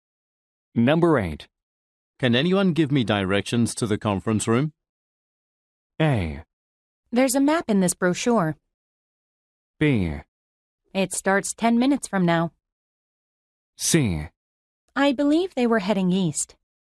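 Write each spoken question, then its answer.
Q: Can anyone give me directions to the conference room?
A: A: There's a map in this brochure.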